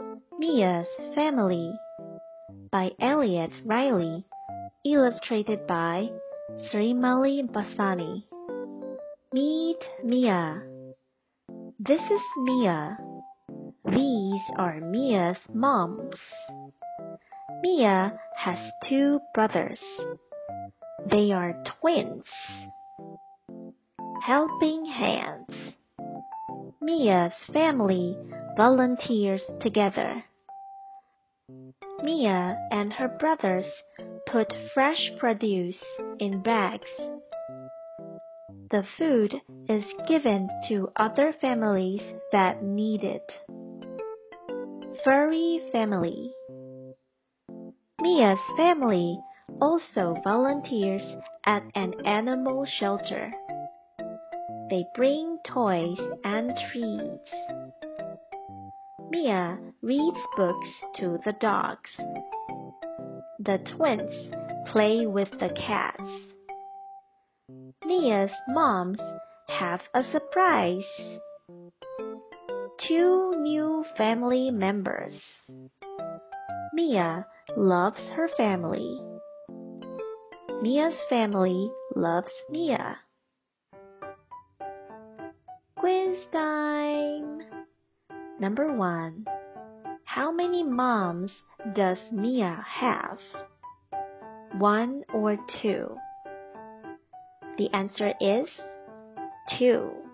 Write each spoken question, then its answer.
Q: How many moms does Mia have?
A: The answer is 2.